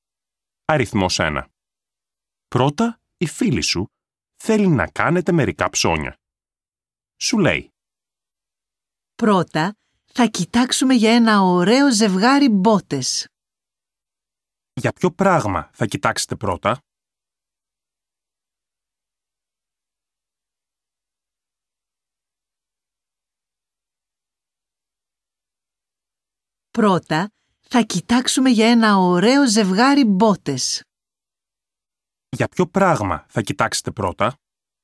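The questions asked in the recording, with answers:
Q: Για ποιο πράγμα θα κοιτάξετε πρώτα?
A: ένα ζευγάρι μπότες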